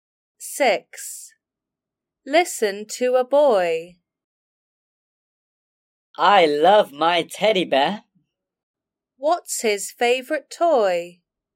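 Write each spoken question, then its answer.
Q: What's his favourite toy?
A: his teddy bear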